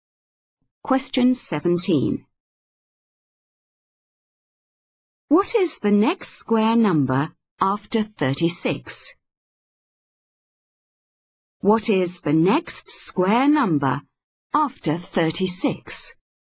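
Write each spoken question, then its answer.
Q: What is the next square number after 36?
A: 49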